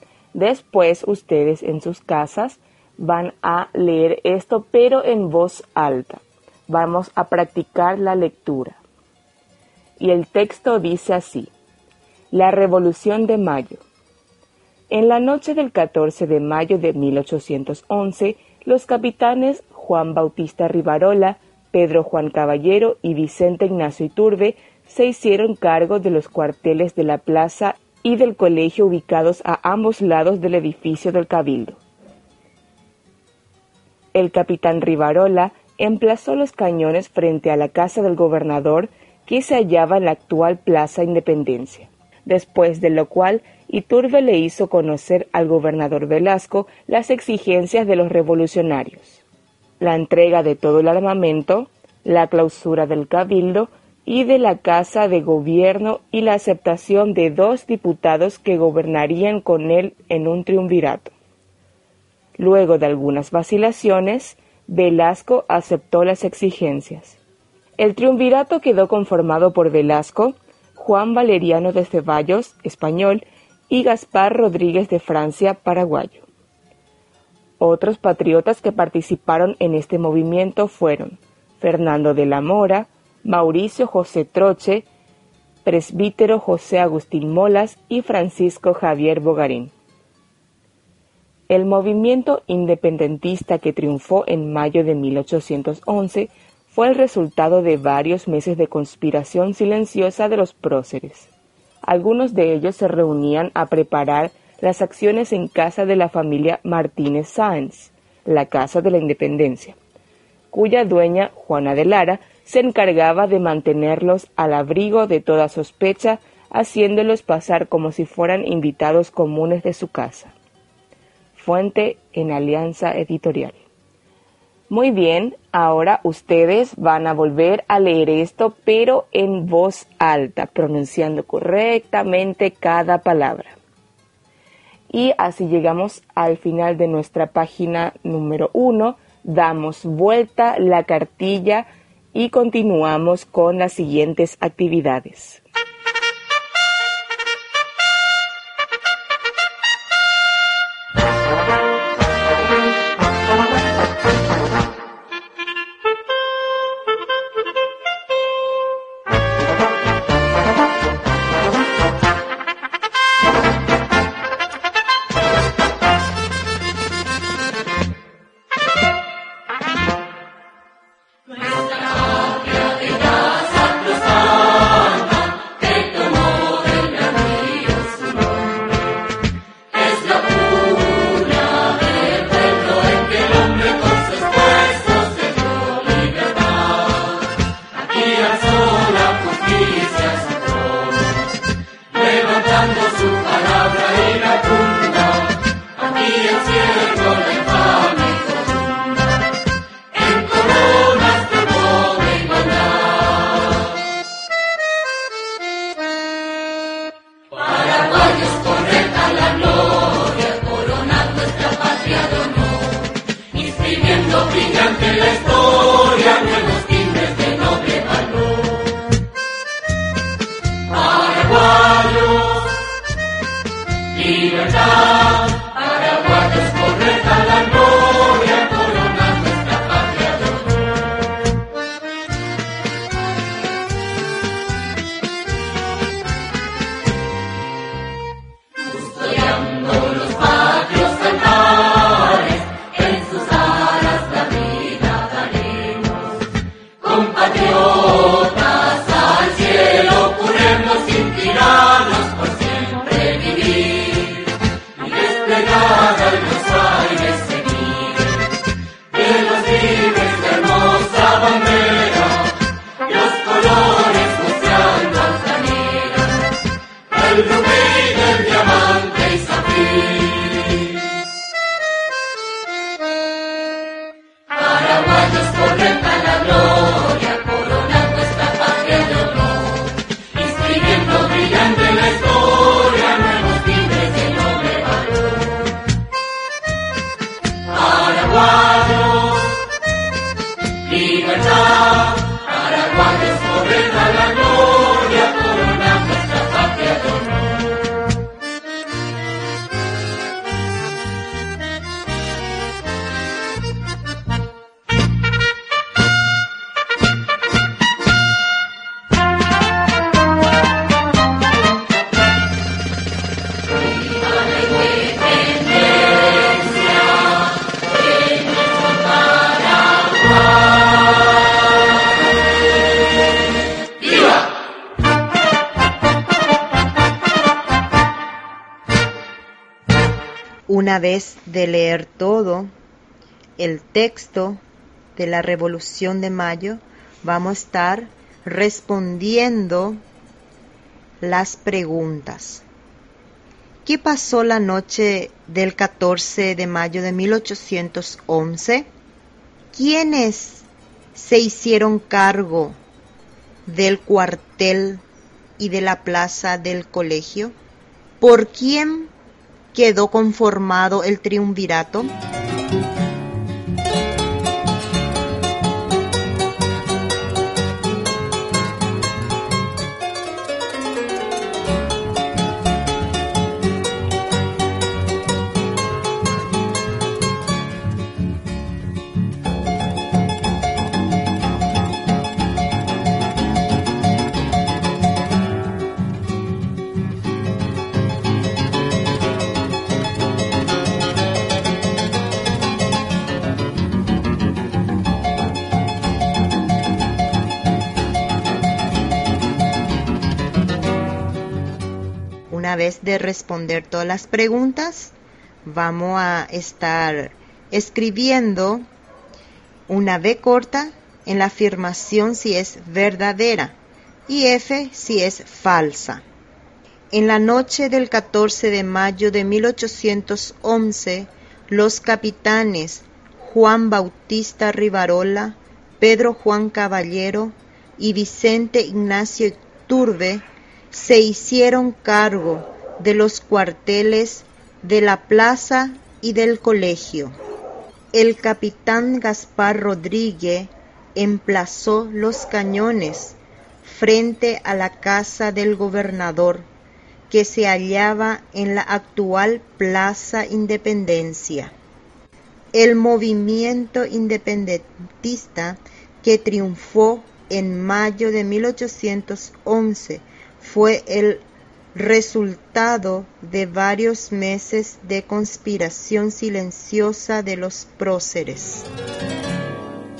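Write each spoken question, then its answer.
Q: ¿Qué pasó la noche del 14 de mayo de 1811?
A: Los capitanes Rivarola, Caballero e Iturbe se hicieron cargo de los cuarteles de la plaza y del colegio

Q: ¿Quiénes se hicieron cargo del cuartel y de la plaza del colegio?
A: Juan Bautista Rivarola, Pedro Juan Caballero y Vicente Ignacio Iturbe

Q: ¿Por quién quedó conformado el triunvirato?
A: Velasco, Juan Valeriano de Ceballos y Gaspar Rodríguez de Francia

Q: En la noche del 14 de mayo de 1811, los capitanes Juan Bautista Rivarola, Pedro Juan Caballero y Vicente Ignacio Iturbe se hicieron cargo de los cuarteles de la plaza y del colegio.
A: V (verdadera)

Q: El capitán Gaspar Rodríguez emplazó los cañones frente a la casa del gobernador, que se hallaba en la actual Plaza Independencia.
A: F (falsa, fue Rivarola)

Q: El movimiento independentista que triunfó en mayo de 1811 fue el resultado de varios meses de conspiración silenciosa de los próceres.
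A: V (verdadera)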